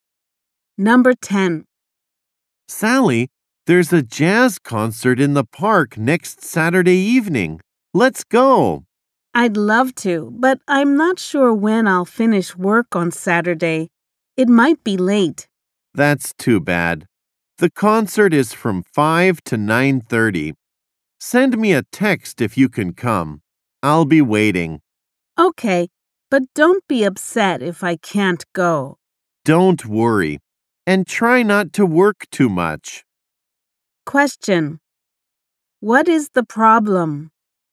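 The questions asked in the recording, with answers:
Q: What is the problem?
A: Sally may finish work too late to go to the concert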